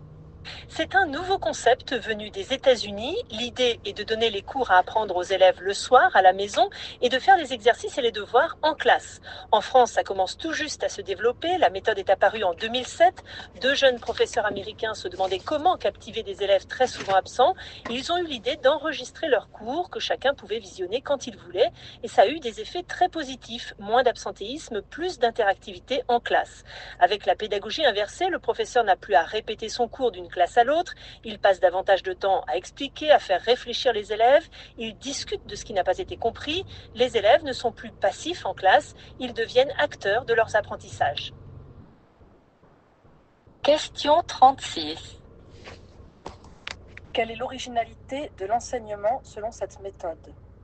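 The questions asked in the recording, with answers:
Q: Quelle est l'originalité de l'enseignement selon cette méthode?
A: Les élèves apprennent les cours le soir à la maison et font les exercices et les devoirs en classe.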